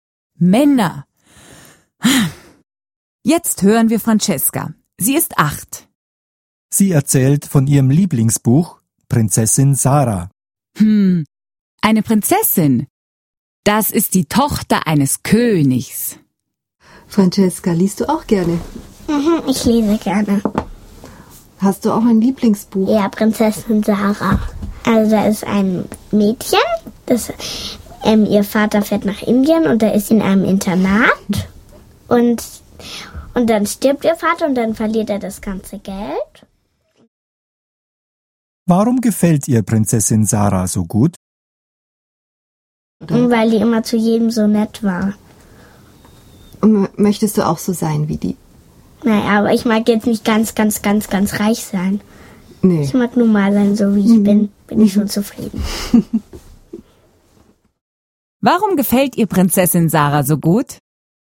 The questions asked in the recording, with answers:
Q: Warum gefällt ihr Prinzessin Sarah so gut?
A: Weil Prinzessin Sarah zu jedem so nett war.